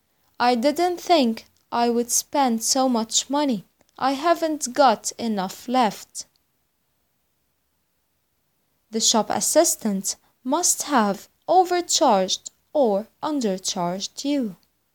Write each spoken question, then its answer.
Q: The shop assistant must have overcharged or undercharged you.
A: The answer is overcharged.